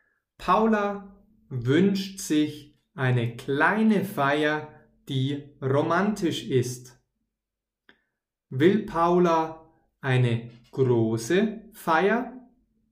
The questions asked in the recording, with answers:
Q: Will Paula eine große Feier?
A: Nein, sie will keine große Feier.